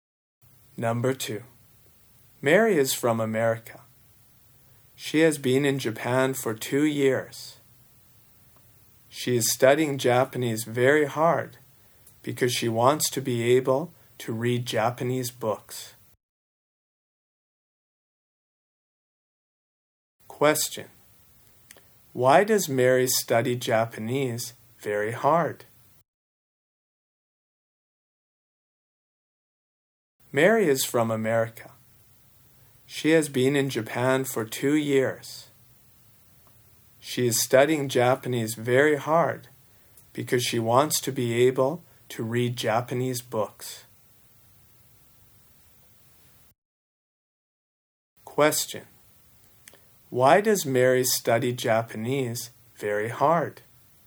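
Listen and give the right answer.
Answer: Because she wants to be able to read Japanese books.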